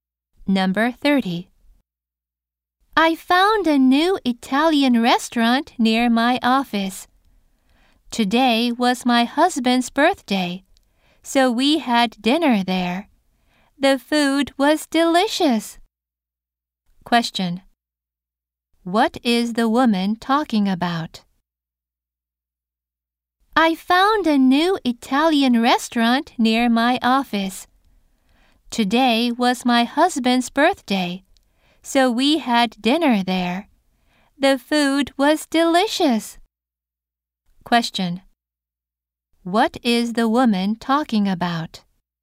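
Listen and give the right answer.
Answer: A new Italian restaurant.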